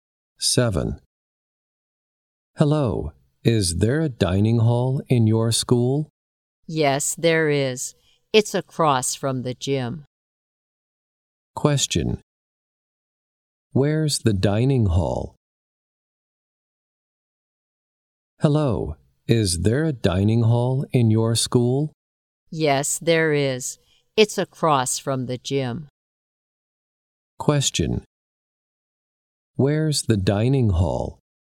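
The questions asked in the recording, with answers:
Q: Where's the dining hall?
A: Across from the gym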